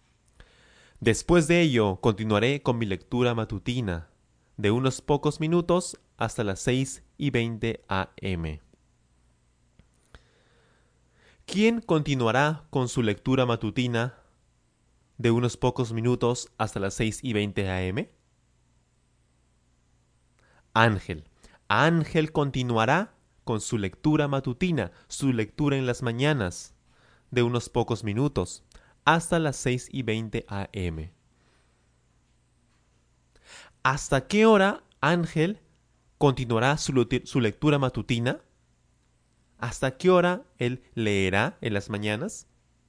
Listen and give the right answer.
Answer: Muy fácil. Hasta las 6 y 20 am.